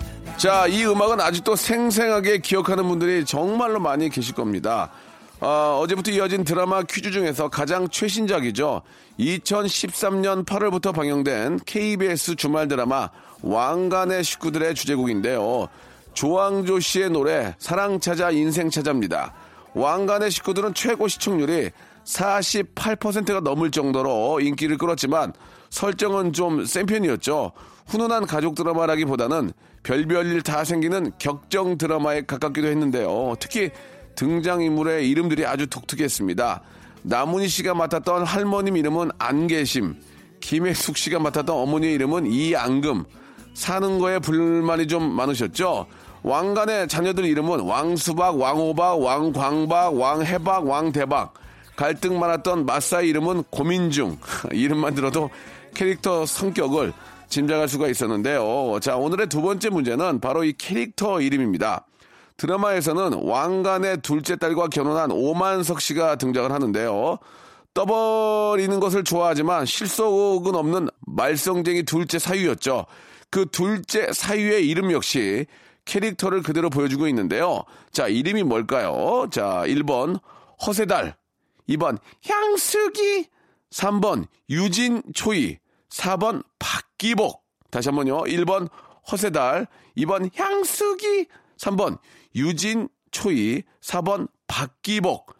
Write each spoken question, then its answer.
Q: 자, 이름이 뭘까요?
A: 정답은 1번 허세달이었습니다.